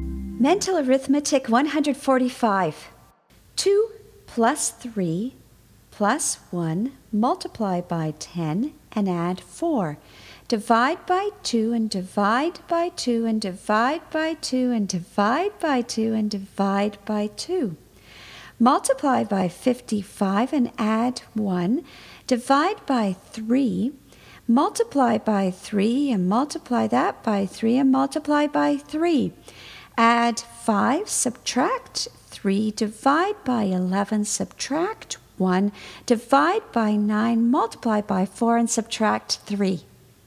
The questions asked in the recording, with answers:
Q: 2 plus 3 plus 1 multiply by 10 and add 4. Divide by 2 and divide by 2 and divide by 2 and divide by 2 and divide by 2. Multiply by 55 and add 1. Divide by 3. Multiply by 3 and multiply that by 3 and multiply by 3. Add 5, subtract 3, divide by 11, subtract 1, divide by 9, multiply by 4, and subtract 3.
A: And the answer is 37.